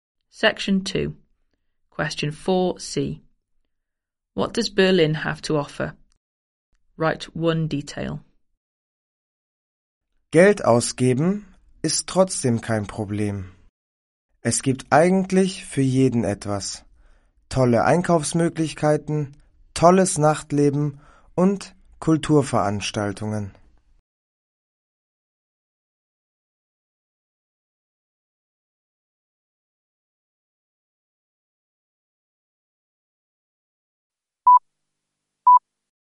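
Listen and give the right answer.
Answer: Great shopping, nightlife and cultural events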